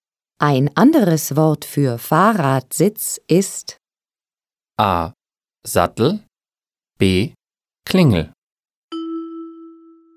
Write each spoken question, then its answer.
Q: Ein anderes Wort für Fahrradsitz ist A. Sattel, B. Klingel.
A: A. Sattel.